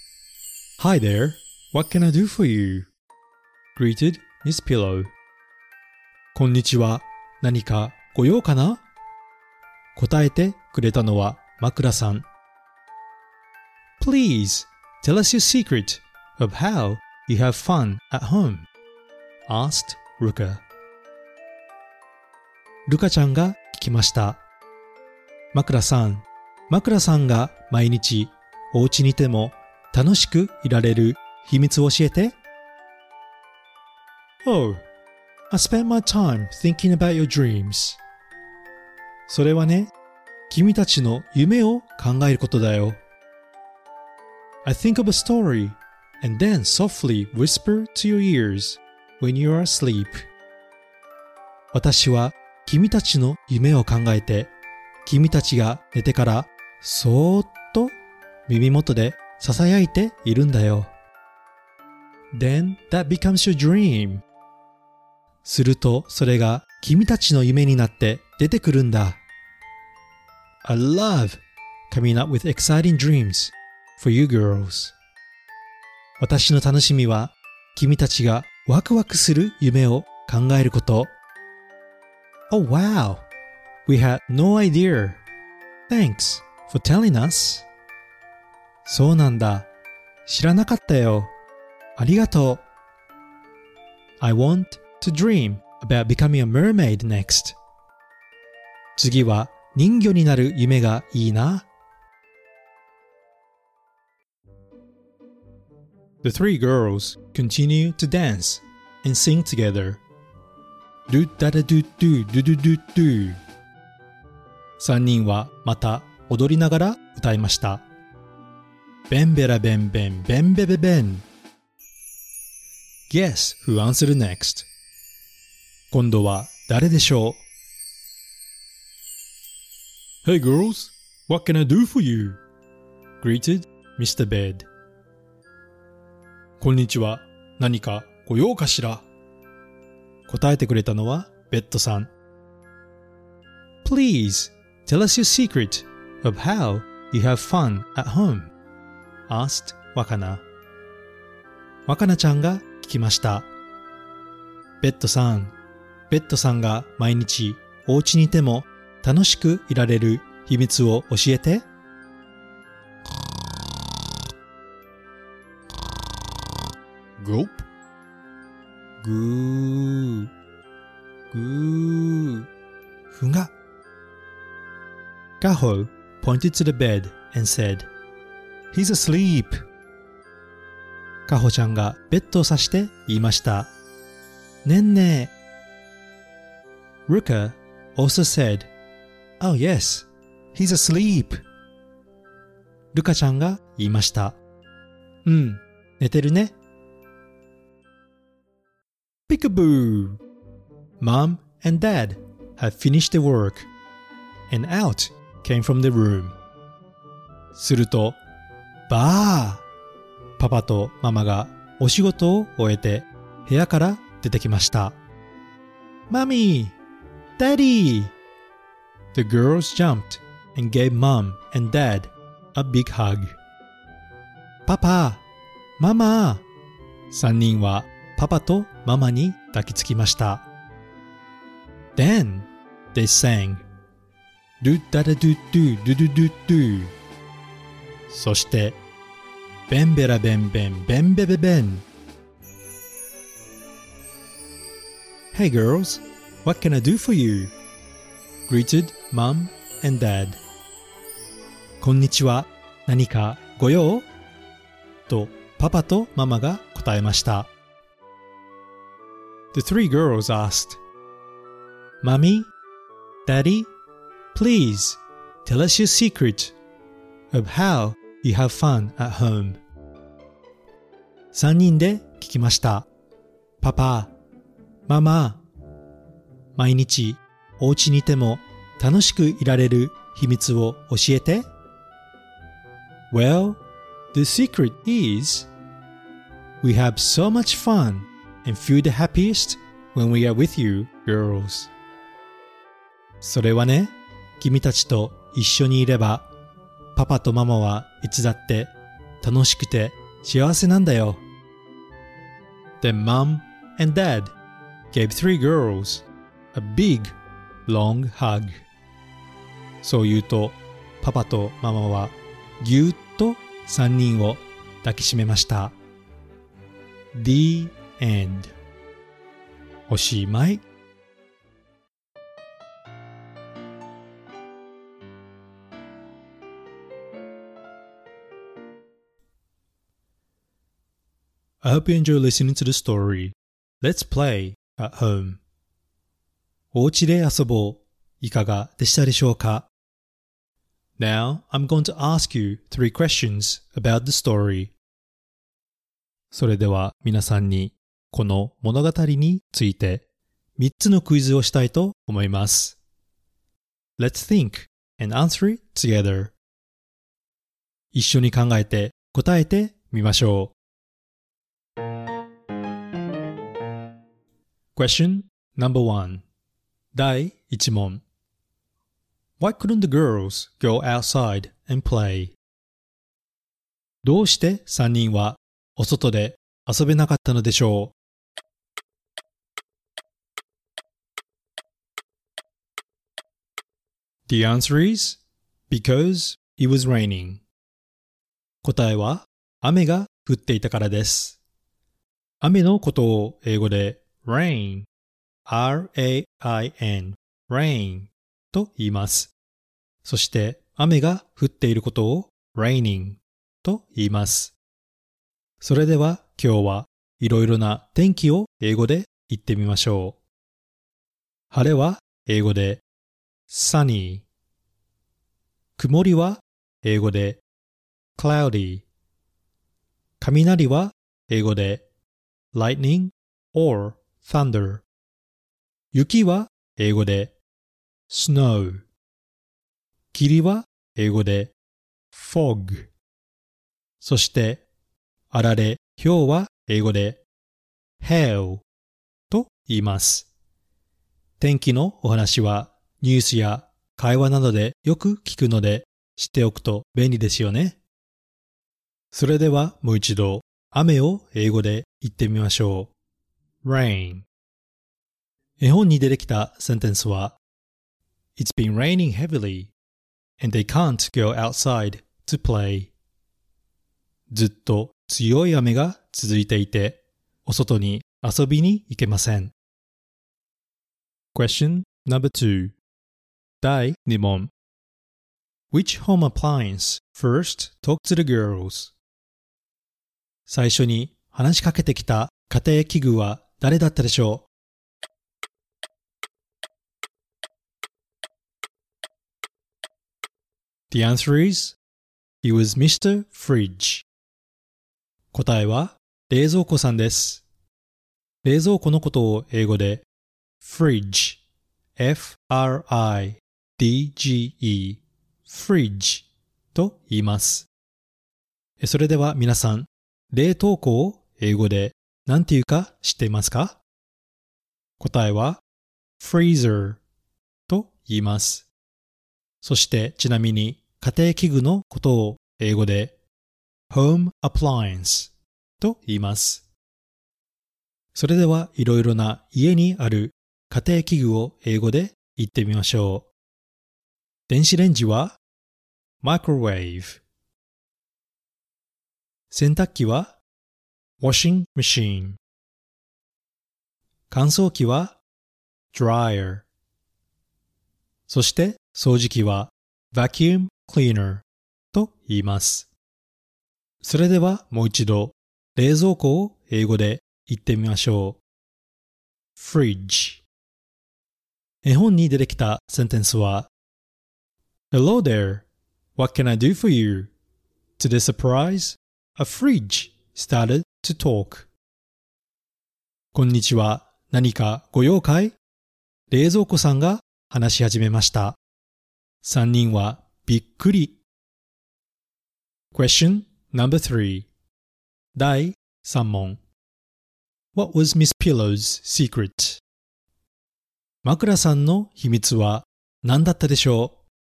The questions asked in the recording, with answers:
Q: What was Miss Pillow's secret?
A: The answer is to think about dreams.